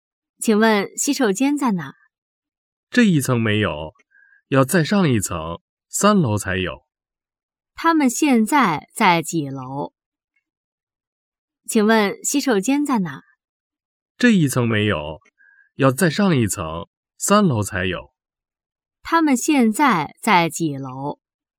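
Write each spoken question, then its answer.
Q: 他们现在在几楼?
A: 二楼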